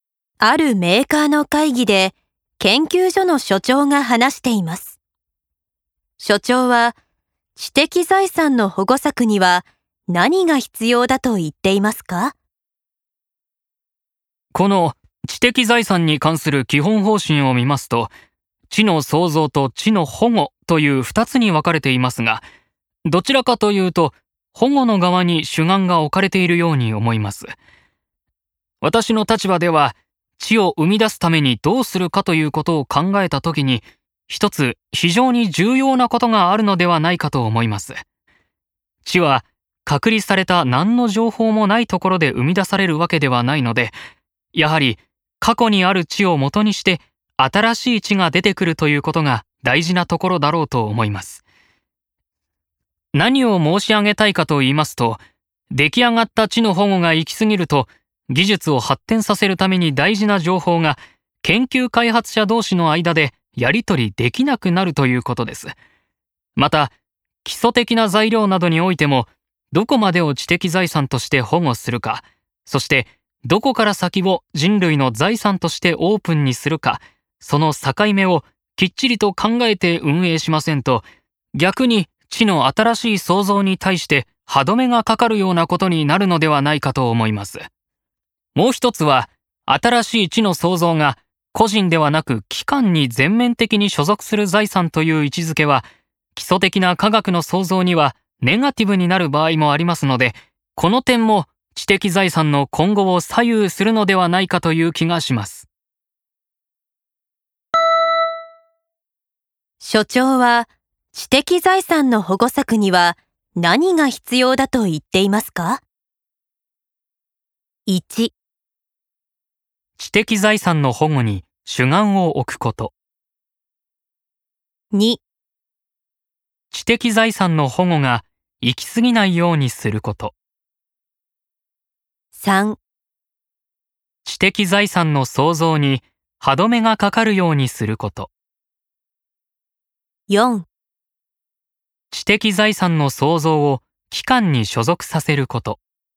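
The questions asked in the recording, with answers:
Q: 所長は知的財産の保護策には何が必要だと言っていますか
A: 2: 知的財産の保護が行き過ぎないようにすること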